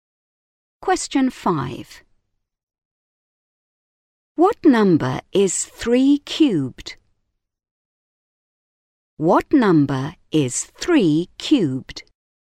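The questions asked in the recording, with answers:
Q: What number is 3 cubed?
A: 27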